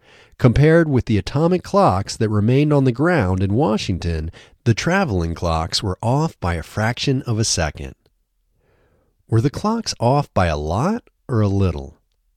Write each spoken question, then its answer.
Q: Were the clocks off by a lot or a little?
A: The clocks were off by a little.